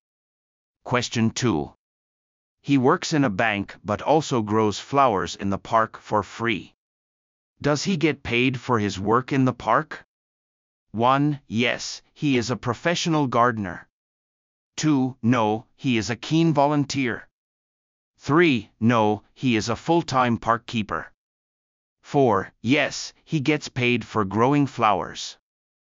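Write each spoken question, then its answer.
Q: Does he get paid for his work in the park?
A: 2: No, he is a keen volunteer.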